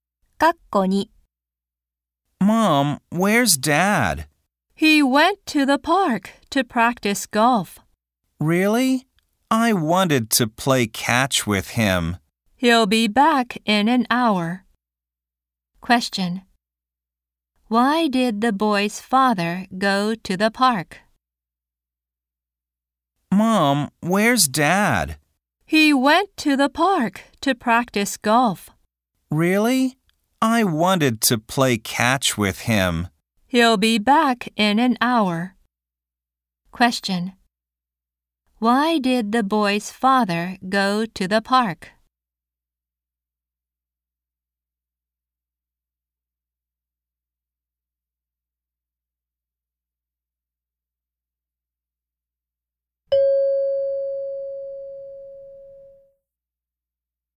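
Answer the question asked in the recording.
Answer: To practice golf.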